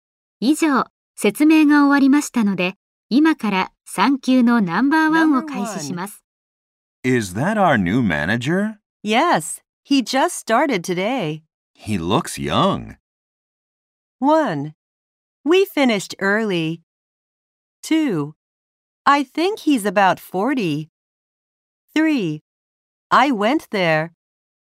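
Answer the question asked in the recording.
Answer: 2: I think he's about 40.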